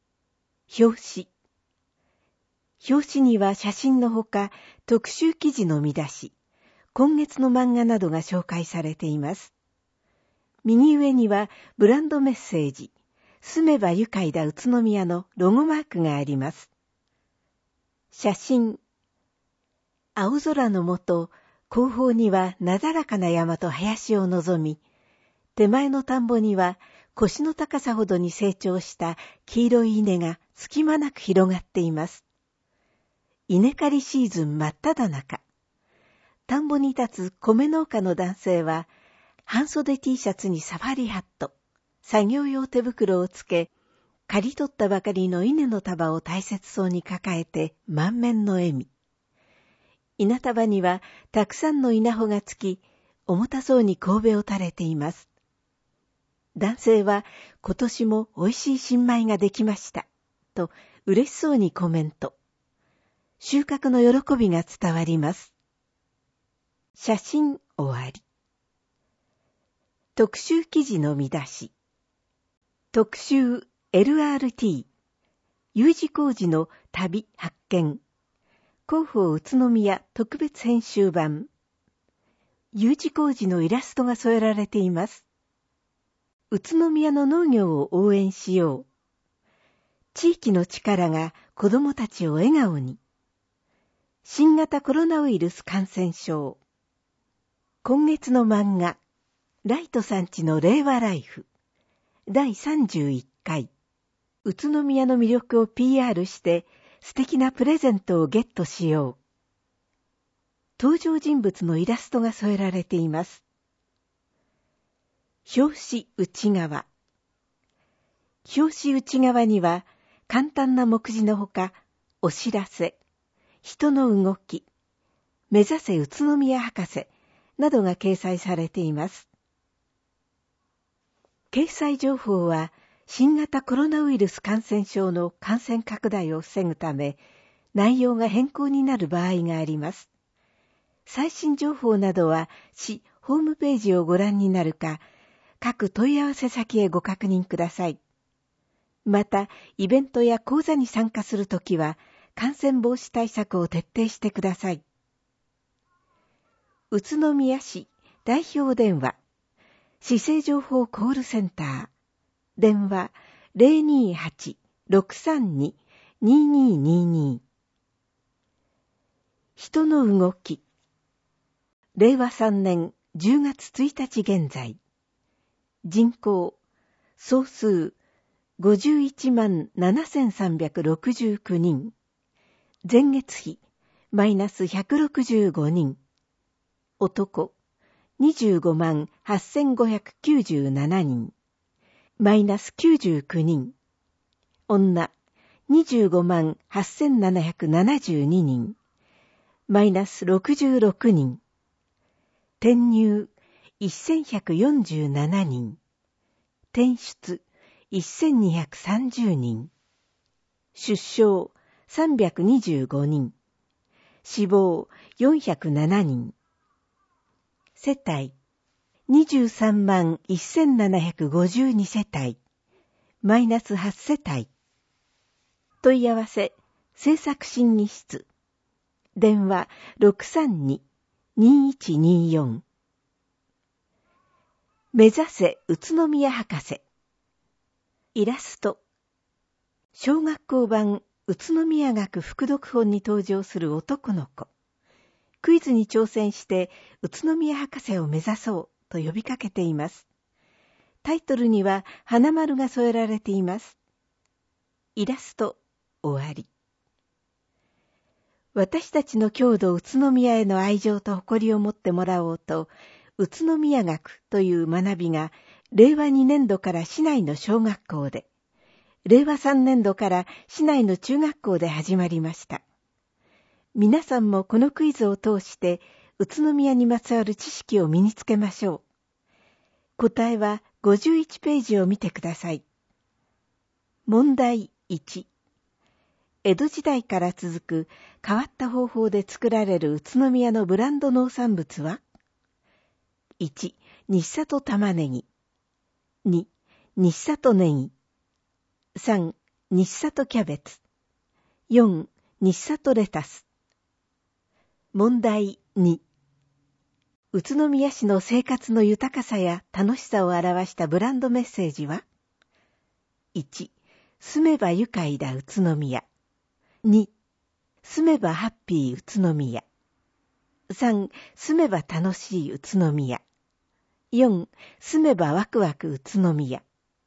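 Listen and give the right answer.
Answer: 1: 住めば愉快だ宇都宮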